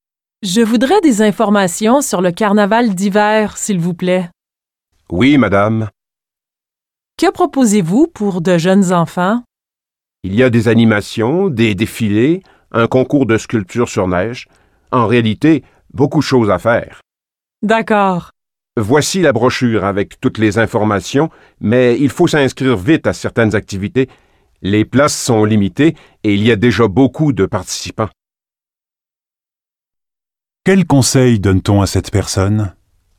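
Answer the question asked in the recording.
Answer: S'inscrire vite à certaines activités, car les places sont limitées.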